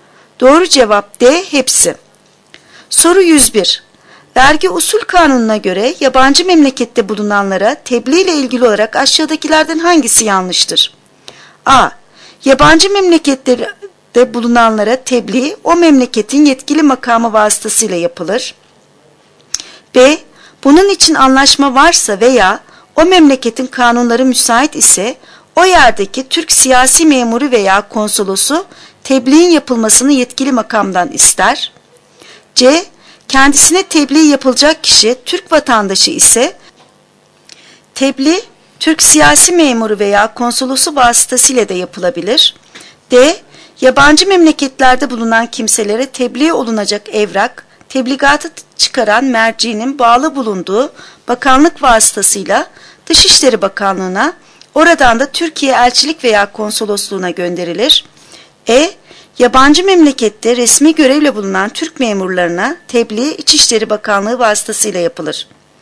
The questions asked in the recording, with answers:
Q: Vergi Usul Kanunu'na göre yabancı memlekette bulunanlara tebliğ ile ilgili olarak aşağıdakilerden hangisi yanlıştır?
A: Doğru cevap E. Yabancı memlekette resmi görevle bulunan Türk memurlarına tebliğ İçişleri Bakanlığı vasıtasıyla yapılır.